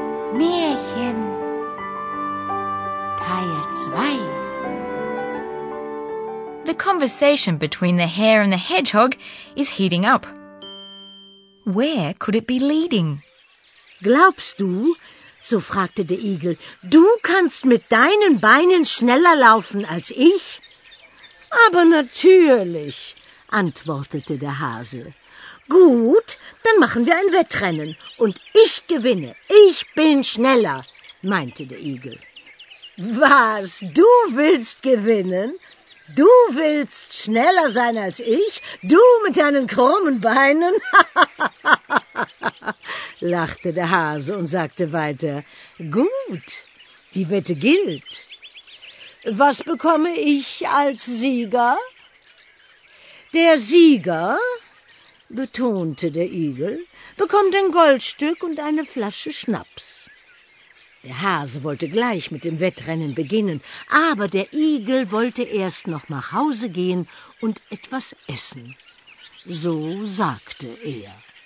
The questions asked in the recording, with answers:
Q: Where could it be leading?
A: The conversation leads to a bet, so you're sure to have understood the key words.